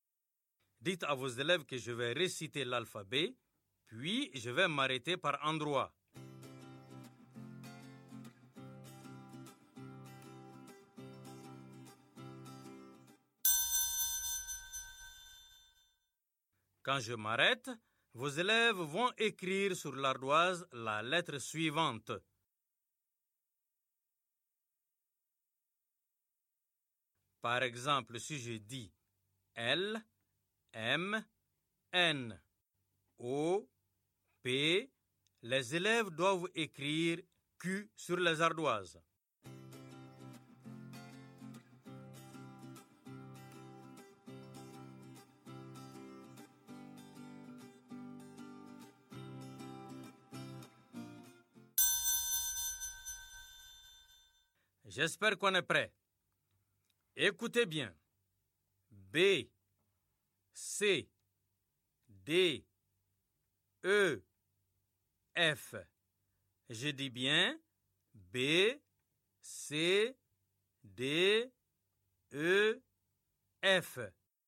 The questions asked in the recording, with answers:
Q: B, C, D, E, F. Je dis bien B, C, D, E, F.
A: J'espère que les élèves ont écrit G.